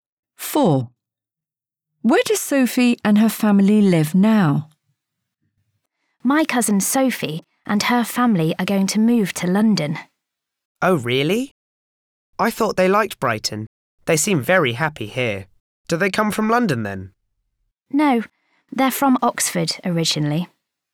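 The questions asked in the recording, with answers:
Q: Where does Sophie and her family live now?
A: Brighton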